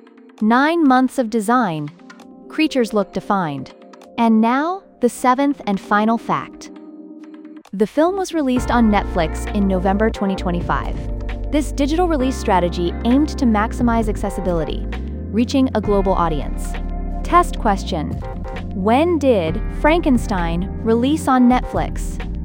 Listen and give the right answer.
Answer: November 2025.